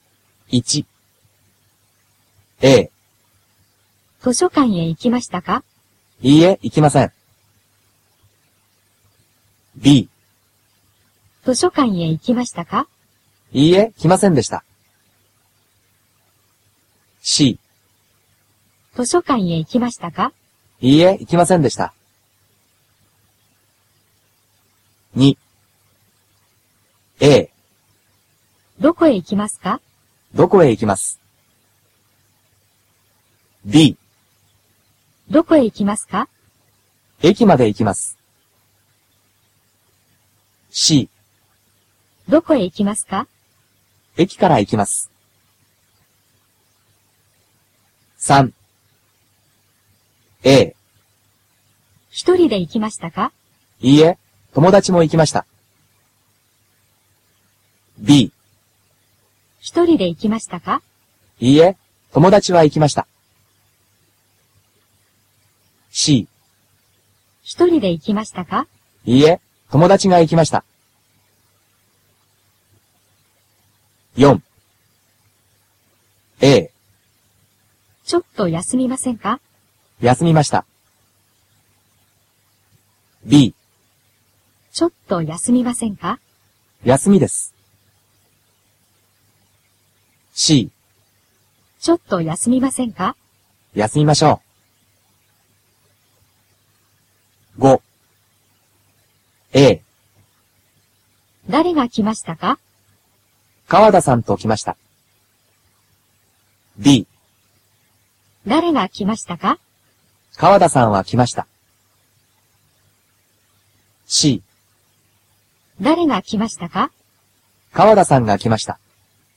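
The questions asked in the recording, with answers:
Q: 図書館へ行きましたか?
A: C: いいえ、行きませんでした。

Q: どこへ行きますか?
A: B: 駅まで行きます。

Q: 一人で行きましたか?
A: A: いいえ、友達も行きました。

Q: ちょっと休みませんか?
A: C: 休みましょう。

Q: 誰が来ましたか?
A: C: 川田さんが来ました。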